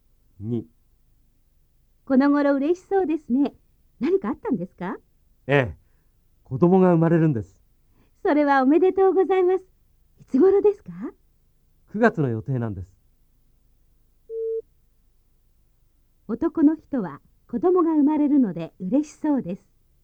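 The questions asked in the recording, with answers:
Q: 男の人は子供が生まれるので嬉しそうです。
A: はい、そうです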